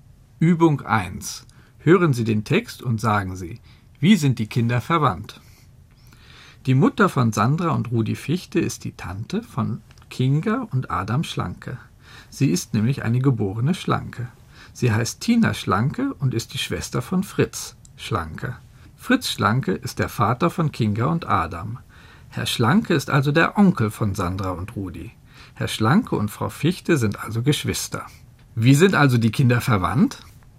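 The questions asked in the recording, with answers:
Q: Wie sind also die Kinder verwandt?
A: Sie sind Cousins und Cousinen.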